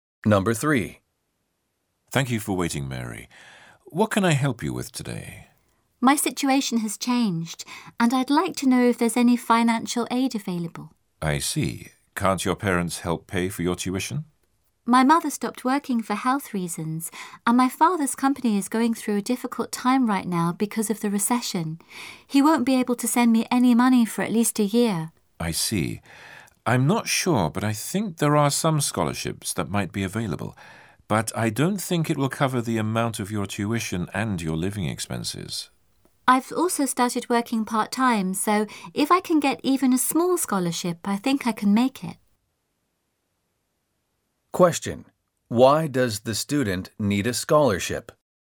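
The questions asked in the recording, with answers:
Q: Why does the student need a scholarship?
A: Her parents can no longer help pay: her mother stopped working for health reasons and her father's company is struggling in the recession.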